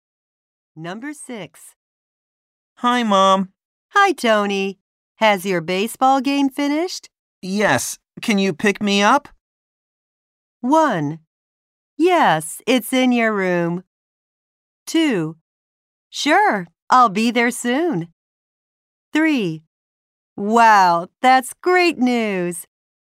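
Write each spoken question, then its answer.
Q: Yes. Can you pick me up?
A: 2: Sure, I'll be there soon.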